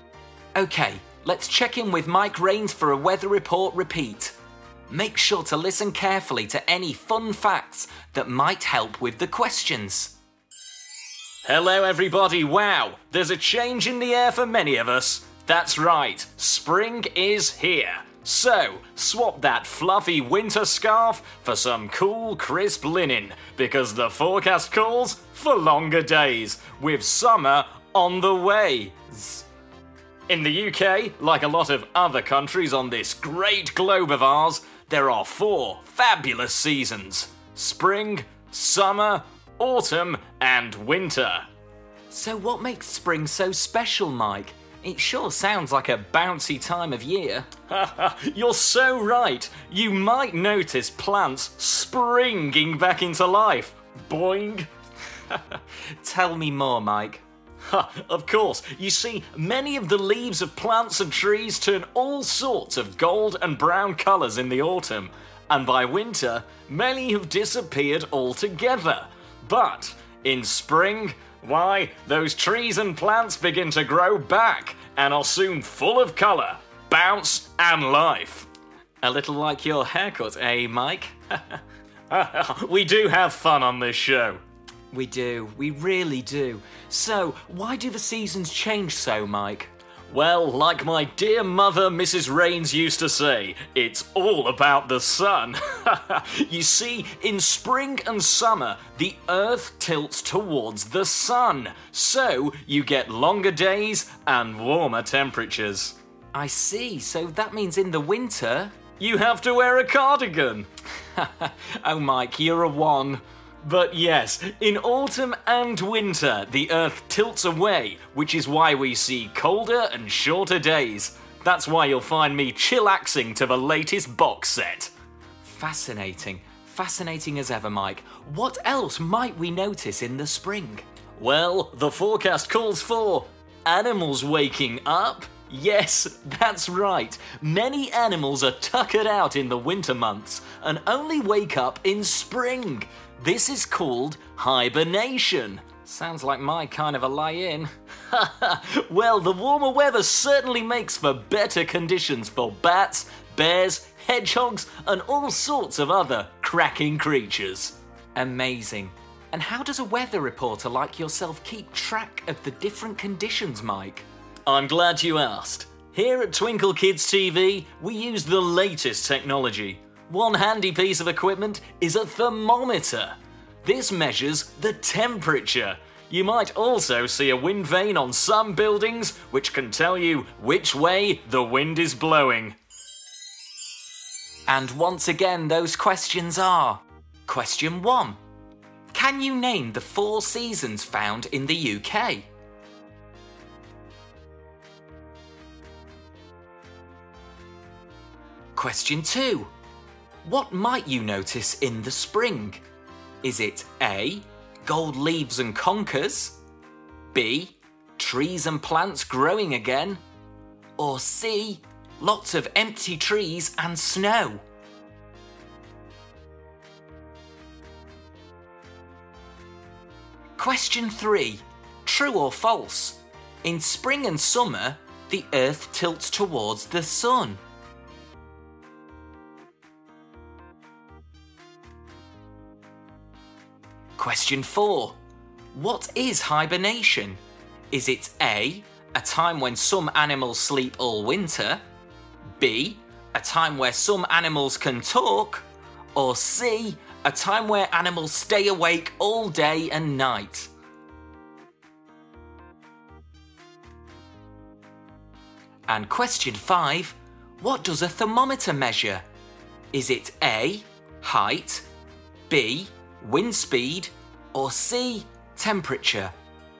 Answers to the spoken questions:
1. Those four seasons are spring, summer, autumn, and winter.
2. Spring is a time of rebirth, so the answer is B.
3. It's true. In the spring and summer months, the Earth tilts towards the sun.
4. But the answer is A. It's a time when some animals sleep all winter.
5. The answer is C.